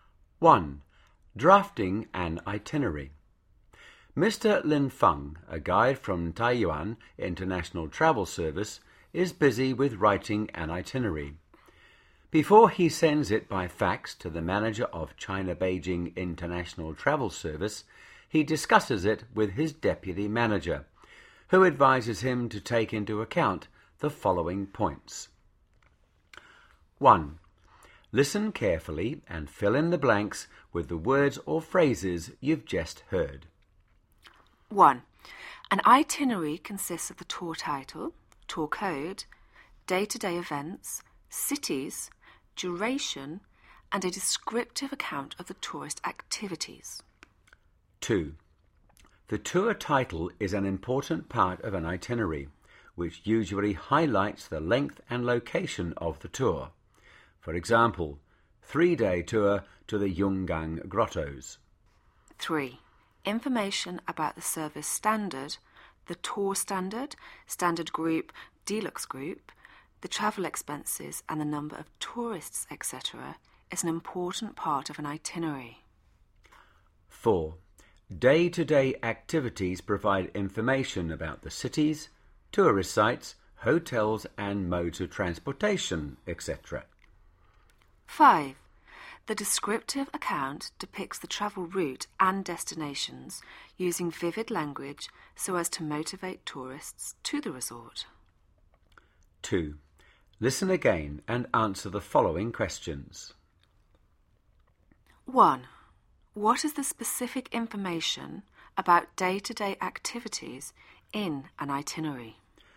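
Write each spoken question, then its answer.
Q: What is the specific information about day-to-day activities in an itinerary?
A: Information about the cities, tourist sites, hotels and modes of transportation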